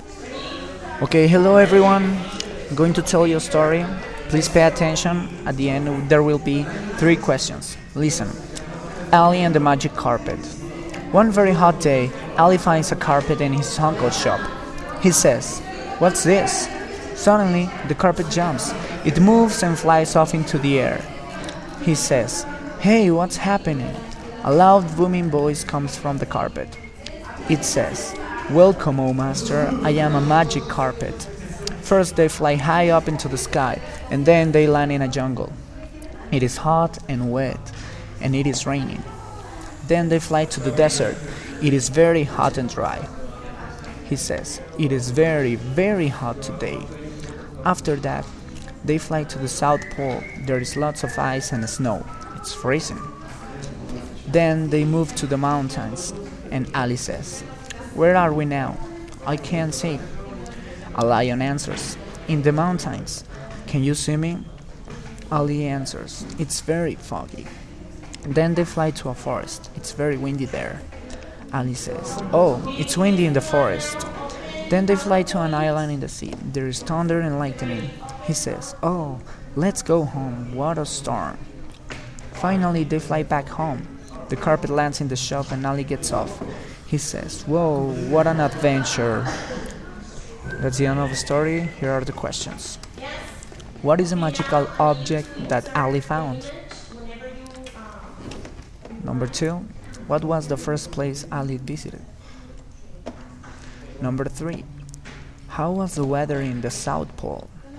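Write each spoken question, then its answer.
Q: What is a magical object that Ali found?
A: A magic carpet

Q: what was the first place Ali visited?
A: A jungle

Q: how was the weather in the South Pole?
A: Freezing, with lots of ice and snow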